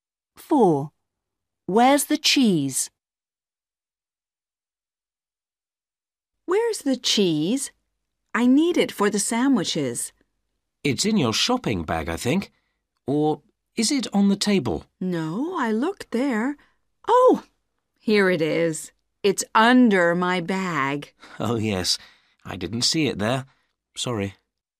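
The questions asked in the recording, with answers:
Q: Where's the cheese?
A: under the bag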